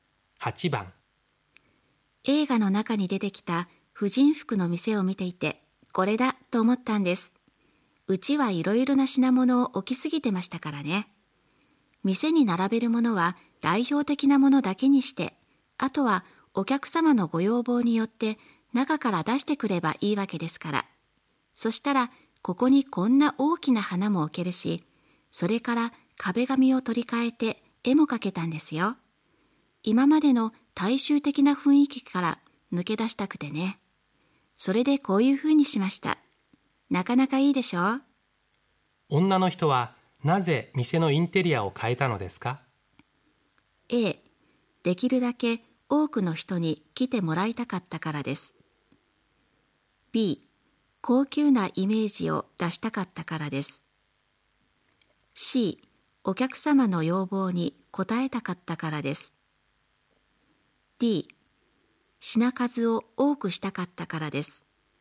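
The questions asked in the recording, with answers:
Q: 女の人はなぜ店のインテリアを変えたのですか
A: B: 高級なイメージを出したかったからです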